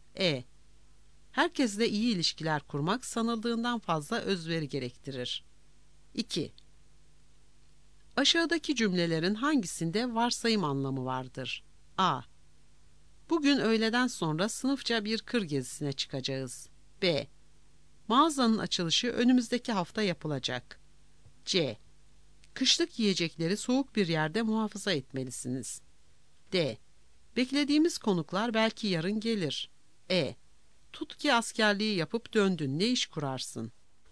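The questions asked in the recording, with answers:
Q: Aşağıdaki cümlelerin hangisinde varsayım anlamı vardır?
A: E: Tut ki askerliği yapıp döndün, ne iş kurarsın?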